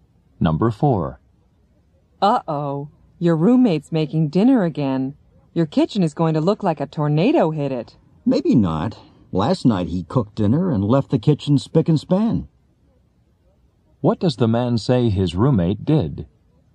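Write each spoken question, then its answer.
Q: What does the man say his roommate did?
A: He cleaned up the kitchen after cooking last night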